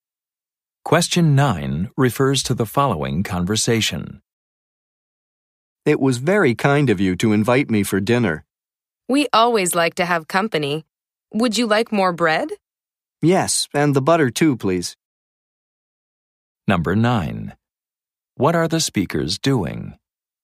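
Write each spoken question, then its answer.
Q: What are the speakers doing?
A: Having dinner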